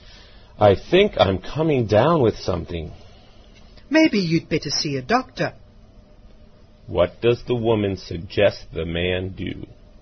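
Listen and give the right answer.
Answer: See a doctor.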